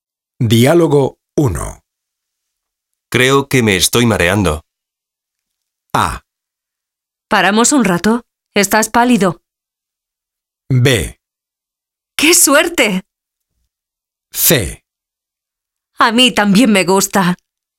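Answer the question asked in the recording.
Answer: A: ¿Paramos un rato? Estás pálido.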